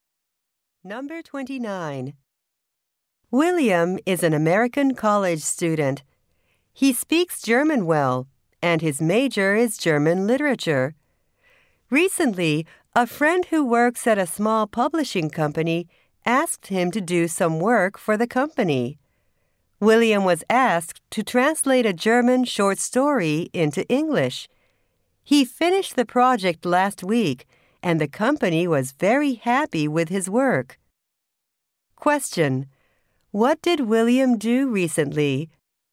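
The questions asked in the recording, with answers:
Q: Question: What did William do recently?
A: He translated a German short story into English.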